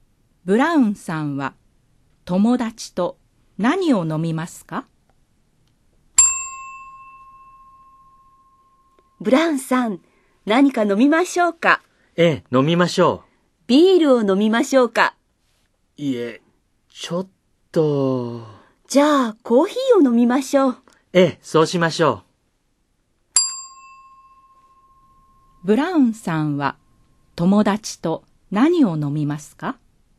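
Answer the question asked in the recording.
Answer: コーヒー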